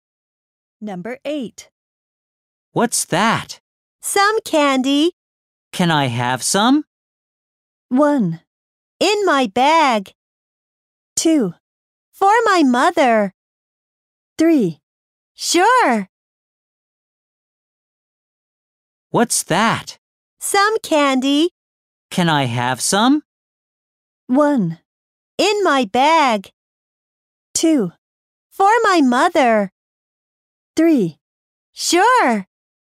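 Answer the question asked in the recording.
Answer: 3: Sure.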